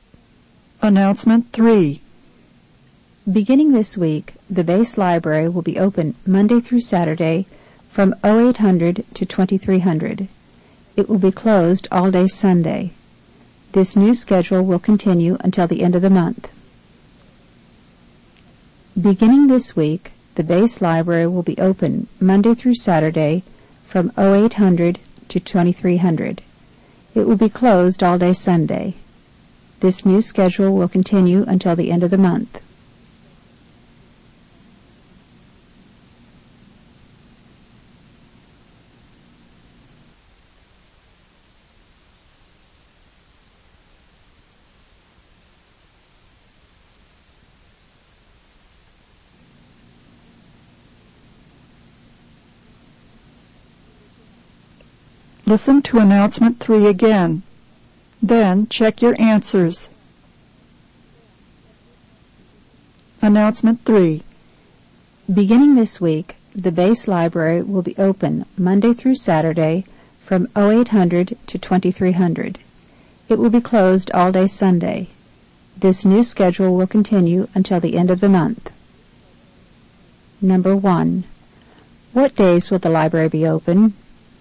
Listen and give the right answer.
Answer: The answer is letter B, Monday through Saturday.